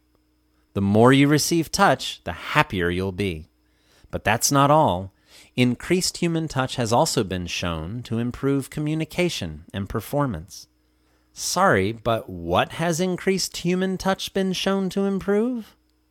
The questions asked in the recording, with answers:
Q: Sorry, but what has increased human touch been shown to improve?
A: Human touch has been shown to improve communication and performance.